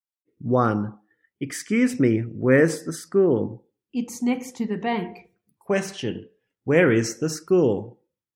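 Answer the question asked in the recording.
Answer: Next to the bank.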